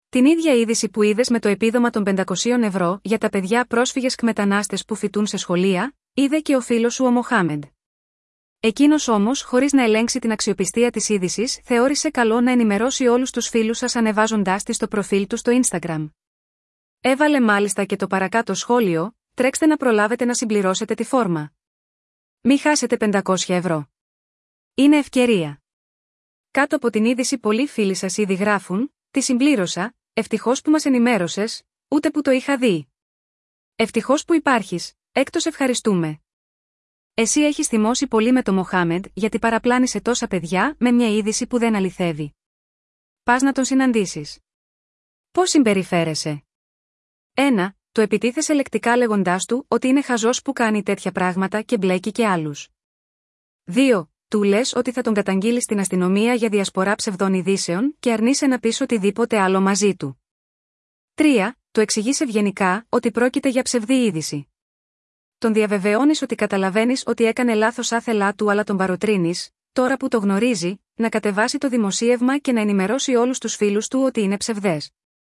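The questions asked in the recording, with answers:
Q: Πας να τον συναντήσεις. Πώς συμπεριφέρεσαι?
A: 3: Του εξηγείς ευγενικά ότι πρόκειται για ψευδή είδηση και τον παροτρύνεις να κατεβάσει το δημοσίευμα και να ενημερώσει τους φίλους του.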